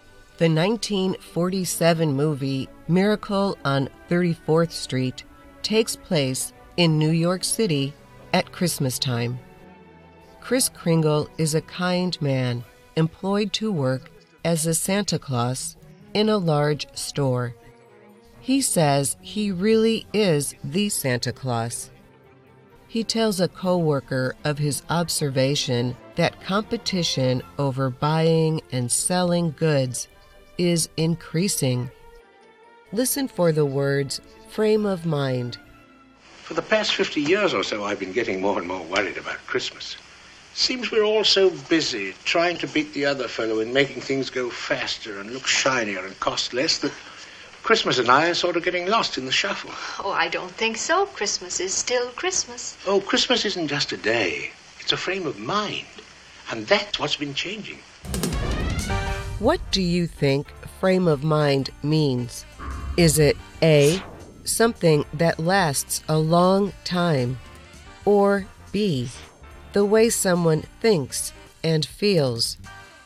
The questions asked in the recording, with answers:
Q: What do you think frame of mind means?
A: The answer is B. It is the way someone thinks and feels.